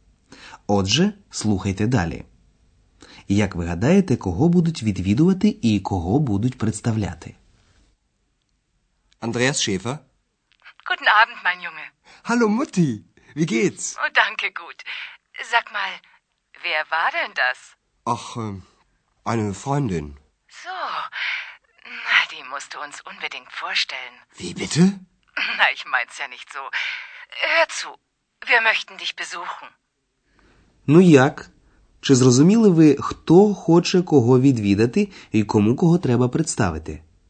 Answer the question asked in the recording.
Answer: Отже, мати Андреаса хоче його відвідати, і ще вона хоче, щоб Андреас представив їй екс.